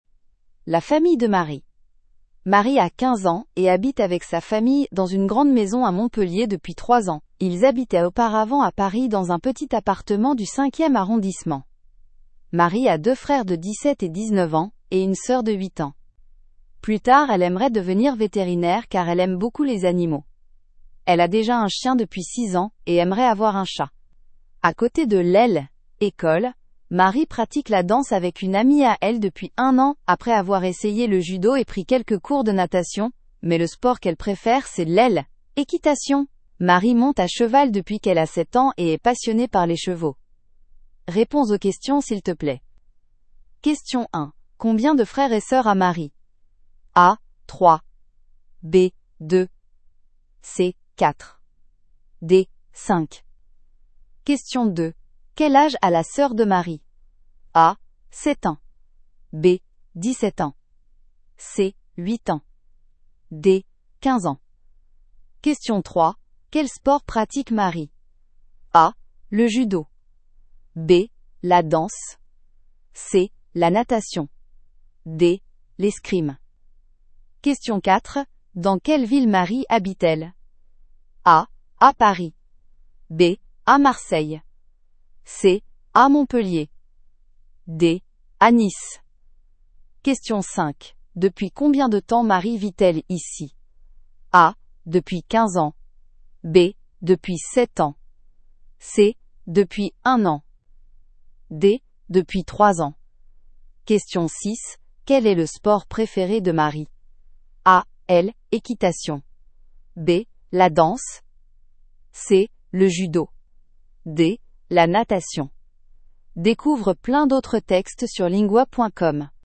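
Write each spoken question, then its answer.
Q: Combien de frères et sœurs a Marie?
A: A: 3

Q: Quel âge a la sœur de Marie?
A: C: 8 ans

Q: Quel sport pratique Marie?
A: B: La danse

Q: Dans quelle ville Marie habite-t-elle?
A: C: À Montpellier

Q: Depuis combien de temps Marie vit-elle ici?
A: D: Depuis 3 ans

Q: Quel est le sport préféré de Marie?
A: A: L'équitation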